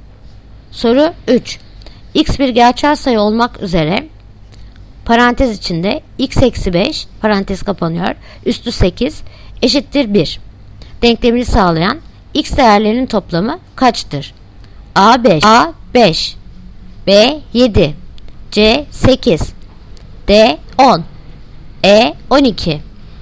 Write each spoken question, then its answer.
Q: X bir gerçel sayı olmak üzere parantez içinde x eksi 5 parantez kapanıyor üstü 8 eşittir 1 denklemini sağlayan x değerlerinin toplamı kaçtır?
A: Yanıt Diyarbakır 10.